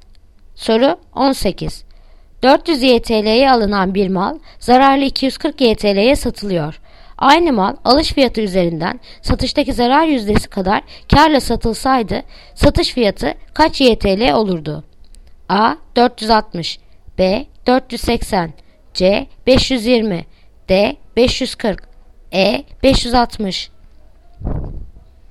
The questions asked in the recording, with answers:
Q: Aynı mal alış fiyatı üzerinden satıştaki zarar yüzdesi kadar kârla satılsaydı satış fiyatı kaç YTL olurdu?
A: Yanıt Edirne 560